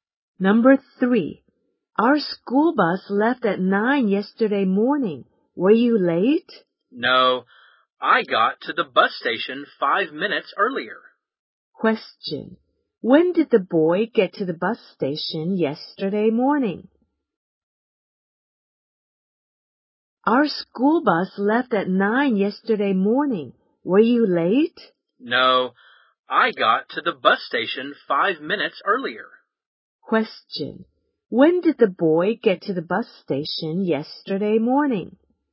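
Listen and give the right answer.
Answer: At 8:55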